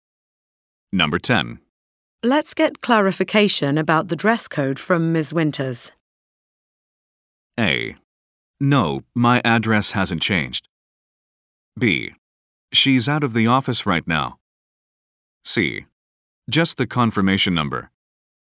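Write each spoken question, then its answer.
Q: Let's get clarification about the dress code from Ms. Winters.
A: B: She's out of the office right now.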